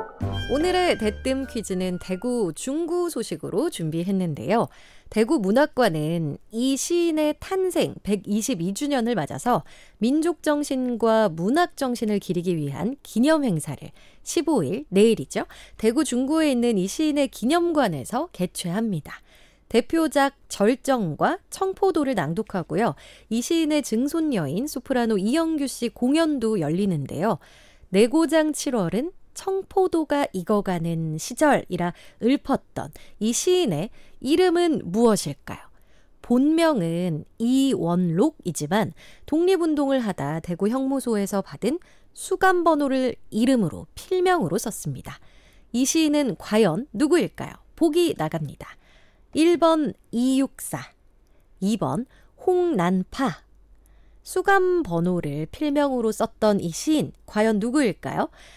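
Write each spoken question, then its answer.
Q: 이 시인은 과연 누구일까요?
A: 1: 이육사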